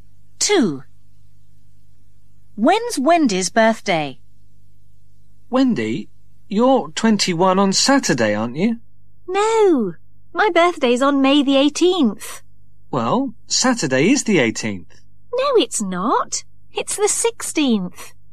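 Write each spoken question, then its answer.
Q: When's Wendy's birthday?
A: May the 18th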